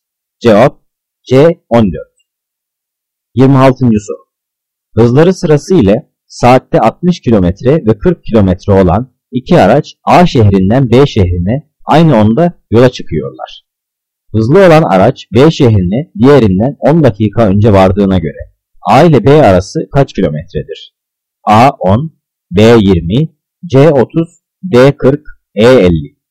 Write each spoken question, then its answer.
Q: Hızlı olan araç B şehrine diğerinden 10 dakika önce vardığına göre A ile B arası kaç kilometredir?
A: Cevap B 20.